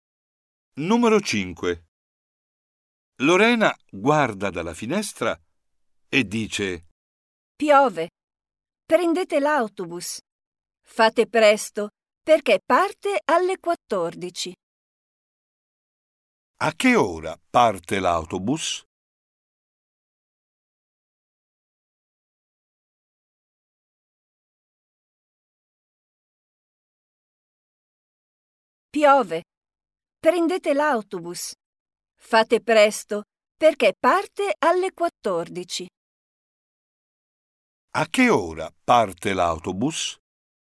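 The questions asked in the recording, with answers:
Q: A che ora parte l'autobus?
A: alle 14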